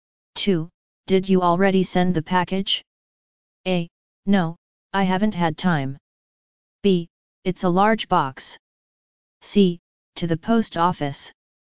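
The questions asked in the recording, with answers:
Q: Did you already send the package?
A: A: No, I haven't had time.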